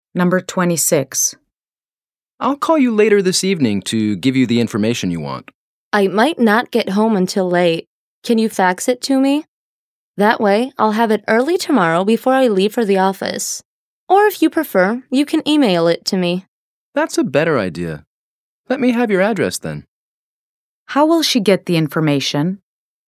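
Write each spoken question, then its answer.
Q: How will she get the information?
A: By email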